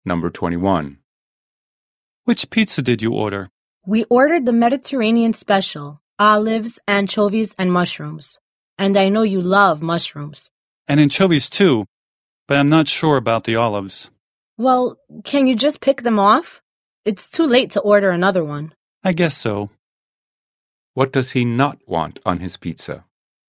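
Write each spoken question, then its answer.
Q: What does he not want on his pizza?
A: Olives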